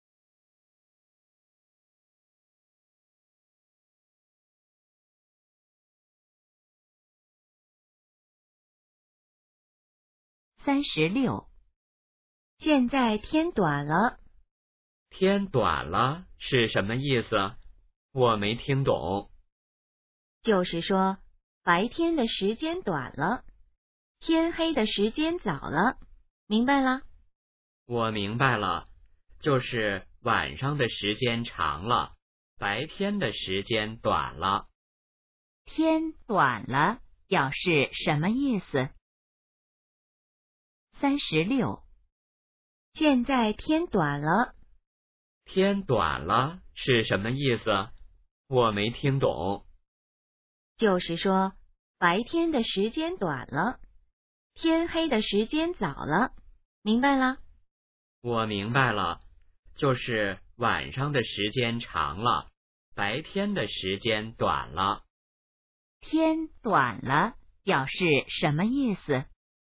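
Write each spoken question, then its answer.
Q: 天短了表示什么意思?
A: 白天的时间短了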